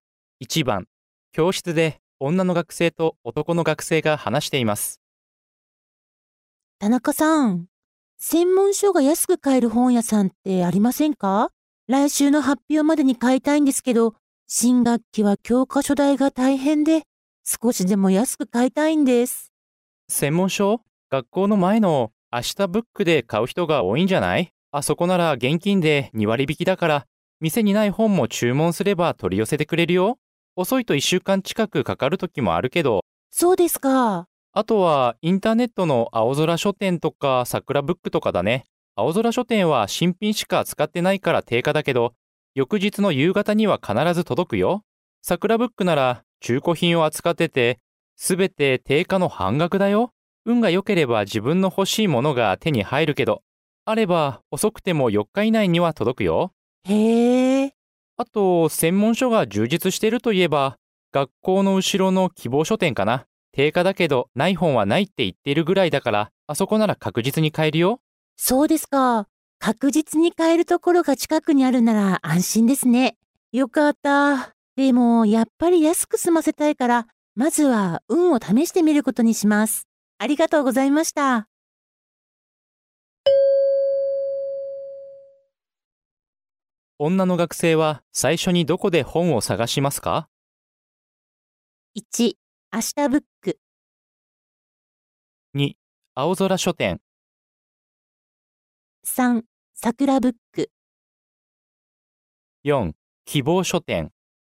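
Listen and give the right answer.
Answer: 3: 桜ブック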